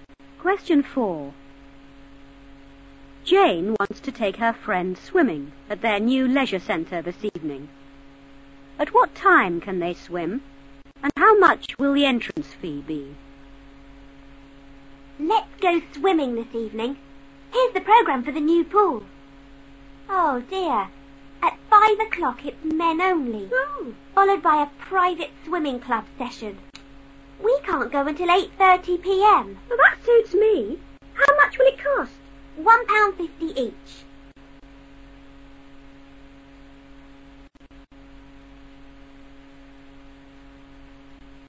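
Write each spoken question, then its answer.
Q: At what time can they swim,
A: 8:30 p.m.

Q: and how much will the entrance fee be?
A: £1.50 each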